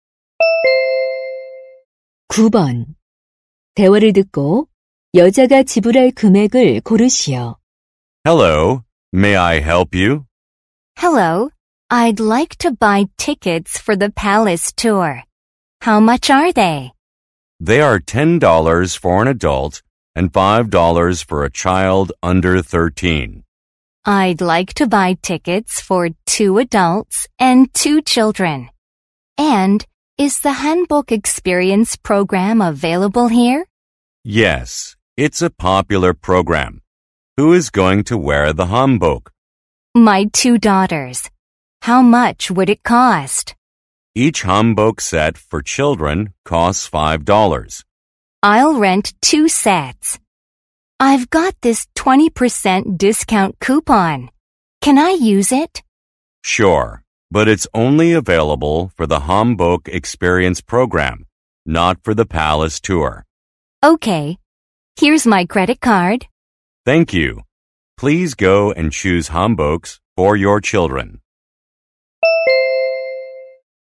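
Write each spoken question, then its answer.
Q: 대화를 듣고 여자가 지불할 금액을 고르시오.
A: $38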